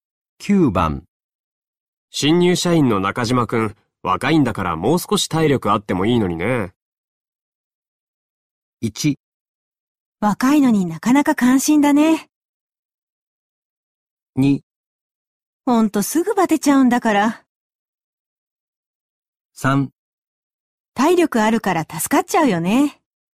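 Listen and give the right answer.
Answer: 2: ほんとすぐバテちゃうんだから。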